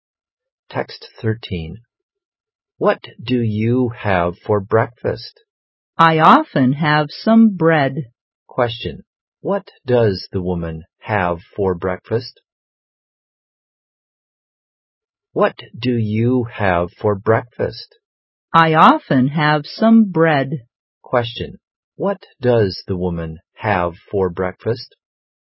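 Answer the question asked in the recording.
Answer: Some bread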